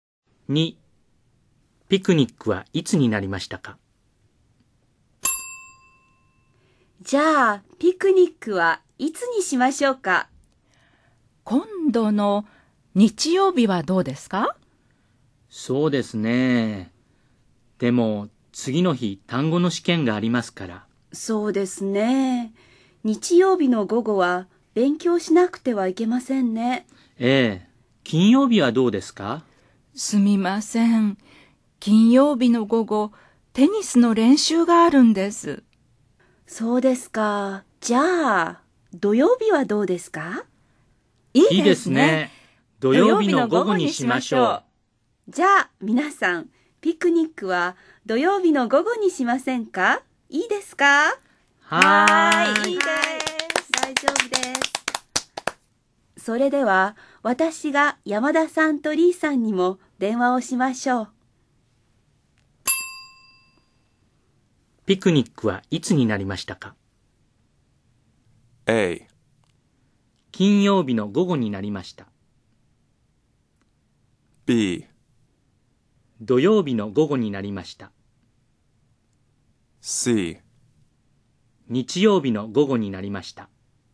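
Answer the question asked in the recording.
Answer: B: 土曜日の午後になりました。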